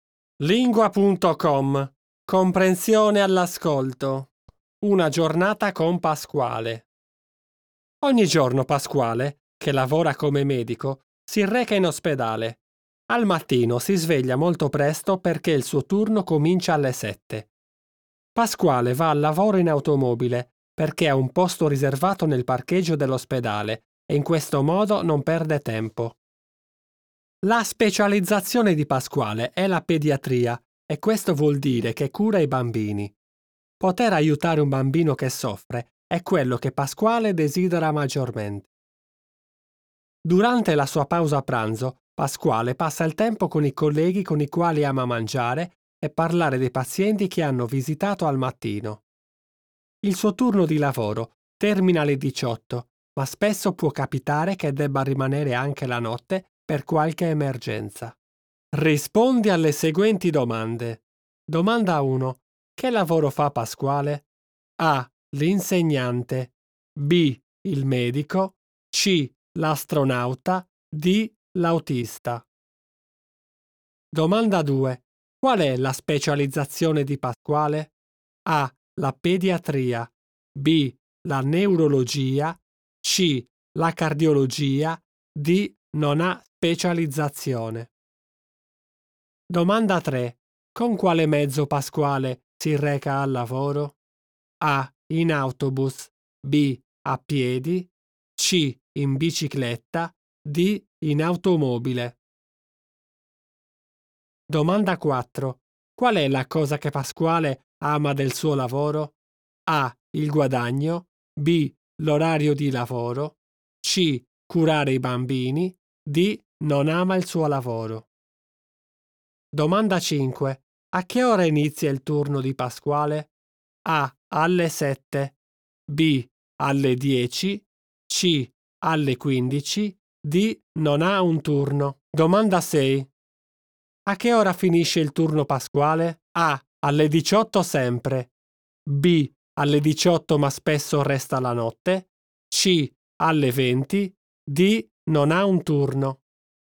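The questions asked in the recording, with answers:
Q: Che lavoro fa Pasquale?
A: B: Il medico.

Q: Qual è la specializzazione di Pasquale?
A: A: La pediatria.

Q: Con quale mezzo Pasquale si reca al lavoro?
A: D: In automobile.

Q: Qual è la cosa che Pasquale ama del suo lavoro?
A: C: Curare i bambini.

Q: A che ora inizia il turno di Pasquale?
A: A: Alle 7.

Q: A che ora finisce il turno Pasquale?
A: B: Alle 18 ma spesso resta la notte.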